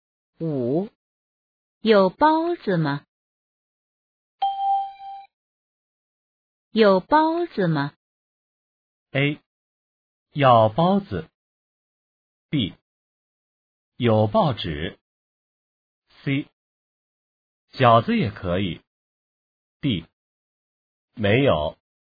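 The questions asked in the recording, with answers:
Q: 有包子吗?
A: D: 没有。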